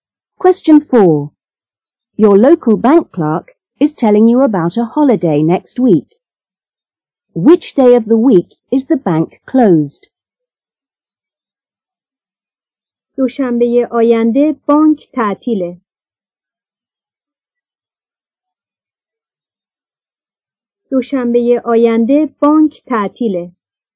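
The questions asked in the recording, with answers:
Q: Which day of the week is the bank closed?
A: Monday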